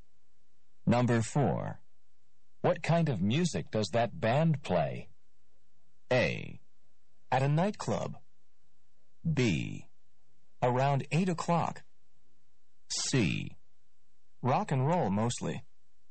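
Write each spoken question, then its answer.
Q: What kind of music does that band play?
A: C: Rock and roll mostly.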